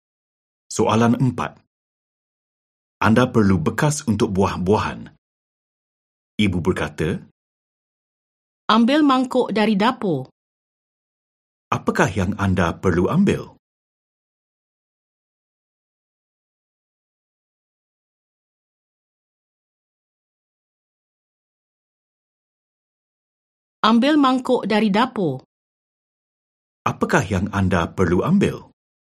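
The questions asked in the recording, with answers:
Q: Apakah yang anda perlu ambil?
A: Mangkuk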